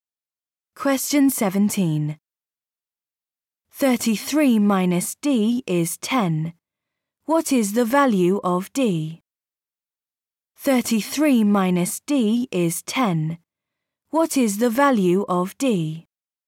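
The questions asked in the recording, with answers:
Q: What is the value of D?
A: 23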